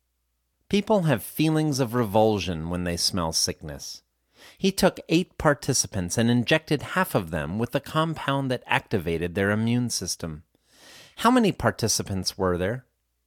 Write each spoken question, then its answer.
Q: How many participants were there?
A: There were 8 participants.